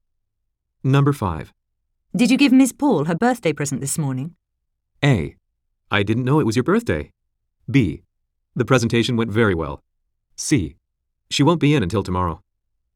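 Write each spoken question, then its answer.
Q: Did you give Miss Paul her birthday present this morning?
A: C: She won't be in until tomorrow.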